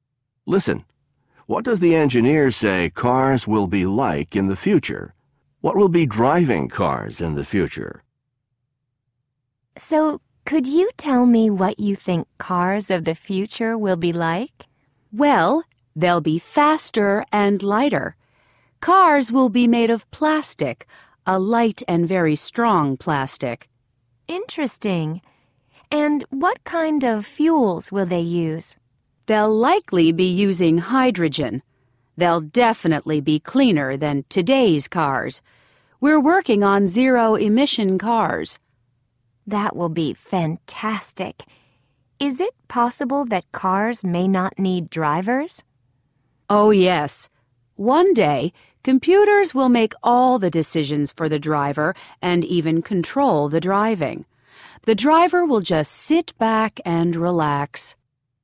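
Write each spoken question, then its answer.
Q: What does the engineer say cars will be like in the future?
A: Faster, lighter, made of strong light plastic, using hydrogen, cleaner

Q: What will be driving cars in the future?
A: Computers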